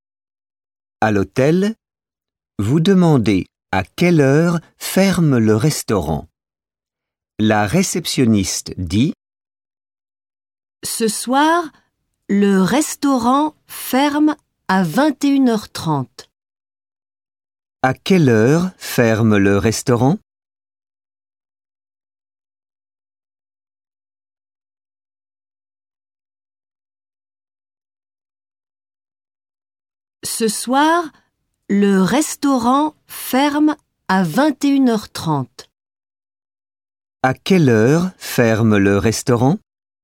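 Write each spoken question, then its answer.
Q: À quelle heure ferme le restaurant?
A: À 21h30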